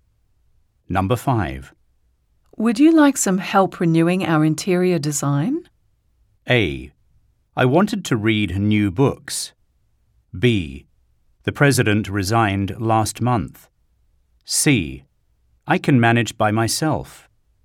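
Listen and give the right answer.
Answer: C: I can manage by myself.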